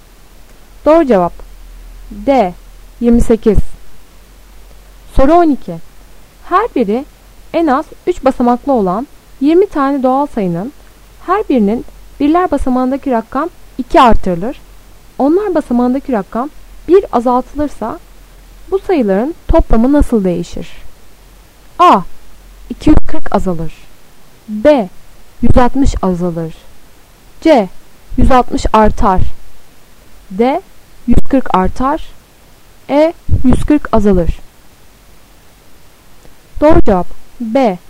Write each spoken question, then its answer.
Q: Onlar basamağındaki rakam 1 azaltılırsa Bu sayıların toplamı nasıl değişir?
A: Doğru cevap B.